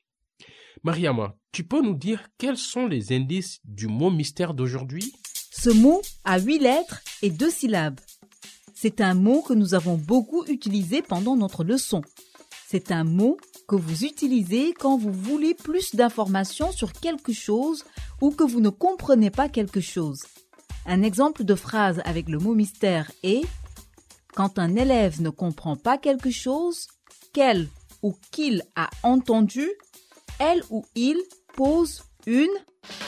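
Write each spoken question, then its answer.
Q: Un exemple de phrase avec le mot mystère est « Quand un élève ne comprend pas quelque chose, qu'elle ou qu'il a entendu, elle ou il pose une... »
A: question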